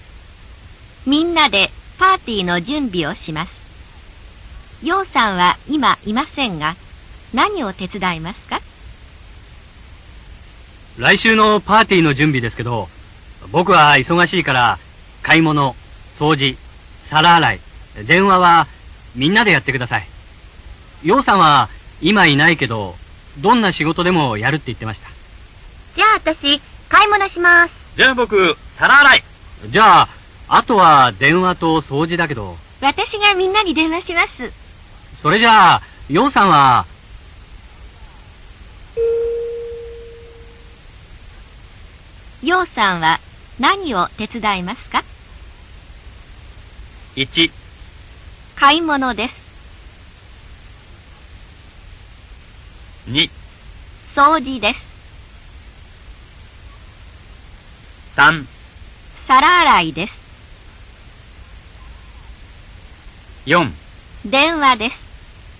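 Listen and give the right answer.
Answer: 2: 掃除です。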